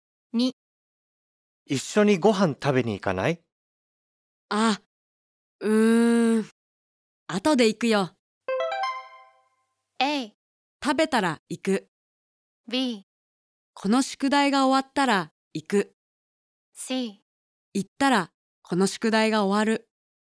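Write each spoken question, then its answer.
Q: 後で行くよ。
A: B: この宿題が終わったら行く。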